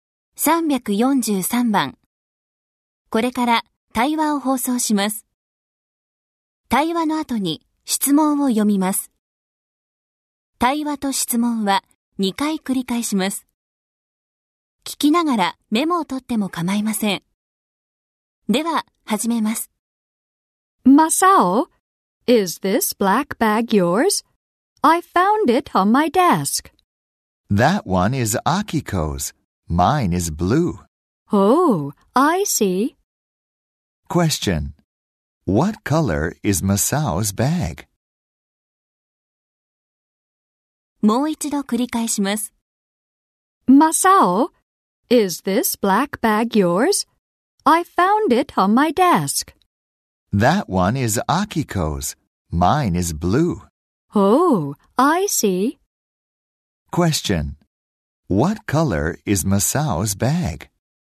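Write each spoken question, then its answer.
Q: What color is Masao's bag?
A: Blue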